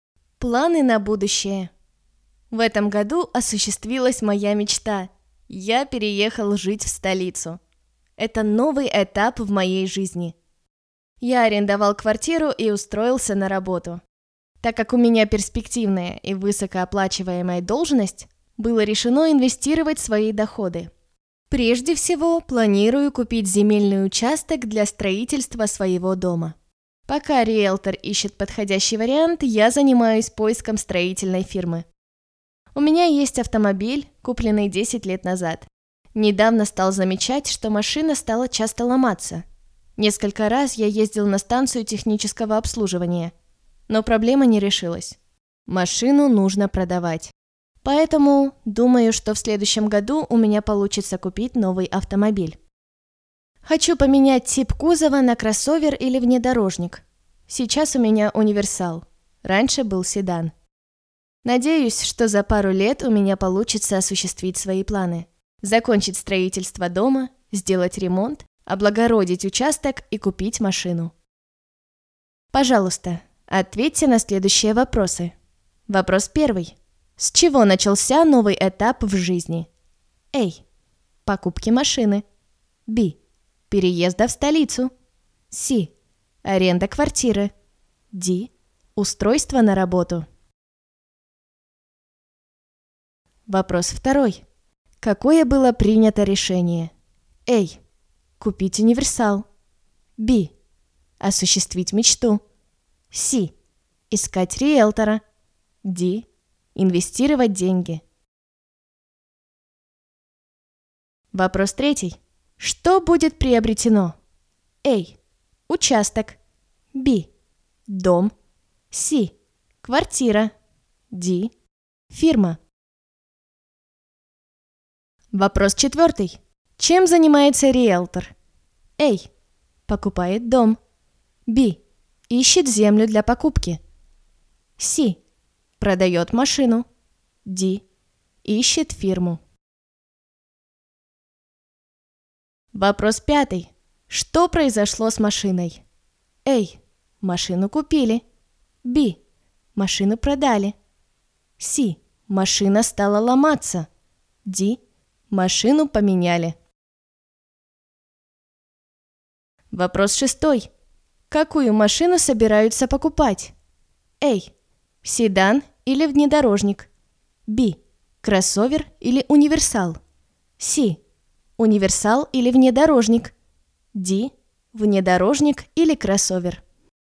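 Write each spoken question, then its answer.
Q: С чего начался новый этап в жизни?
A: B: Переезда в столицу.

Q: Какое было принято решение?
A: D: Инвестировать деньги.

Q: Что будет приобретено?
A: A: Участок.

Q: Чем занимается риэлтор?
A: B: Ищет землю для покупки.

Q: Что произошло с машиной?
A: C: Машина стала ломаться.

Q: Какую машину собираются покупать?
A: D: Внедорожник или кроссовер.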